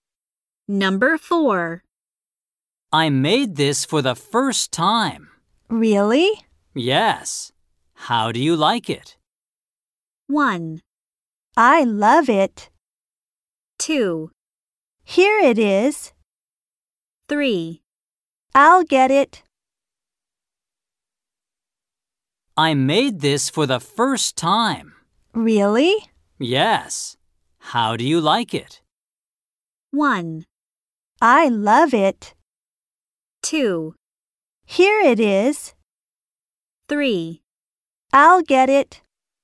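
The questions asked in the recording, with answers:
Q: Yes. How do you like it?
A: 1: I love it.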